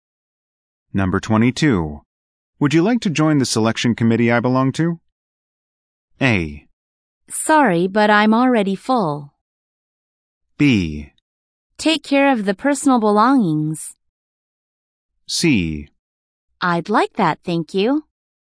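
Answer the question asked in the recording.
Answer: C: I'd like that, thank you.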